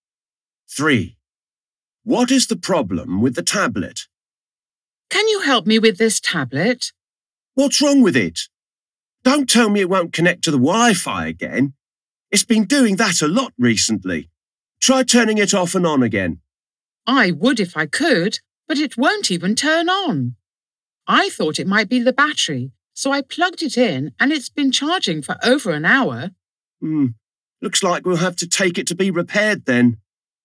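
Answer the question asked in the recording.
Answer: It won't turn on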